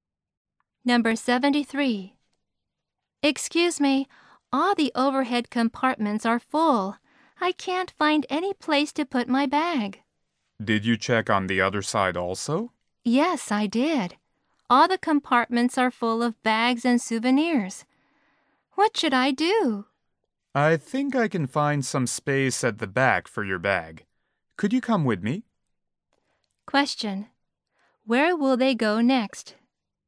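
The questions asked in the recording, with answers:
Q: Where will they go next?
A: To the back (of the plane) to find space for the bag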